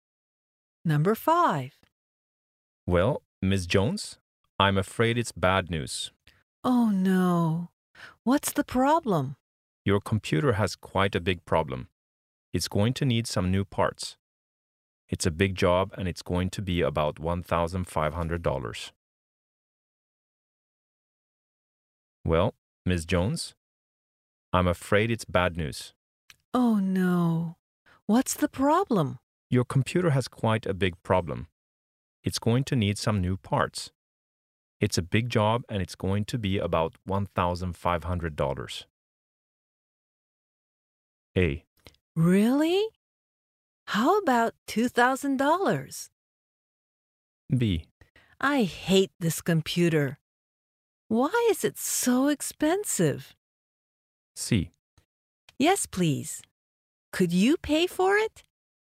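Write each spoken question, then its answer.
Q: It's a big job and it's going to be about $1,500.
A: B: I hate this computer. Why is it so expensive?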